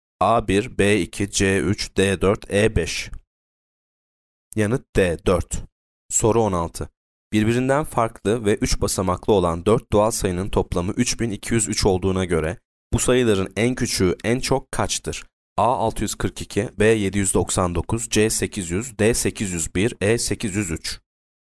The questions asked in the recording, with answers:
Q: Birbirinden farklı ve 3 basamaklı olan 4 doğal sayının toplamı 3203 olduğuna göre bu sayıların en küçüğü en çok kaçtır?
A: Yanıt B 799.